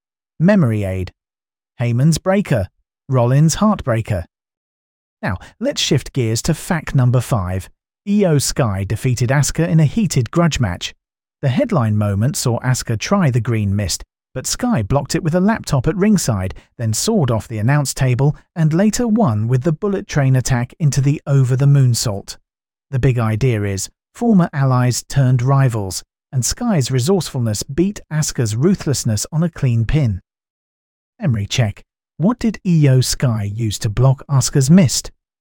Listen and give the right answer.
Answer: Correct answer, a laptop.